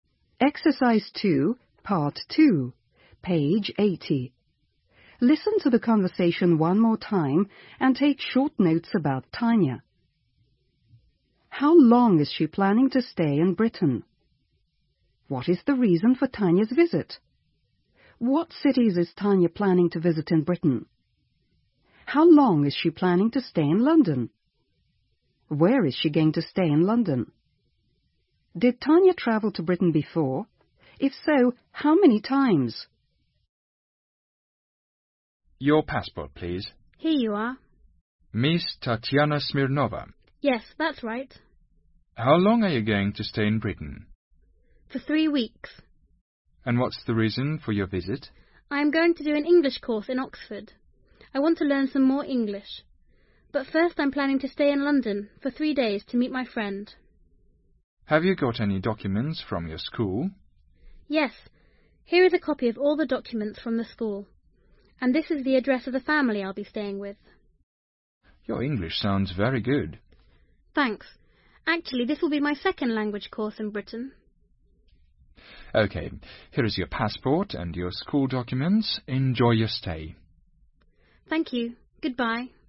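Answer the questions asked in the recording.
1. For 3 weeks
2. To do an English course in Oxford
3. London and Oxford
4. 3 days
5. Yes
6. Once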